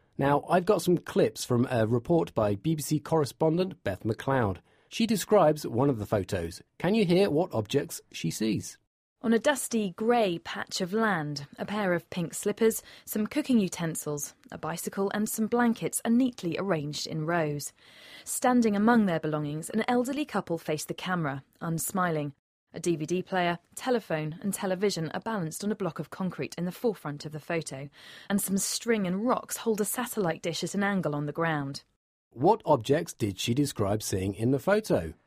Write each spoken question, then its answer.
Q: What objects did she describe seeing in the photo?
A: A pair of slippers.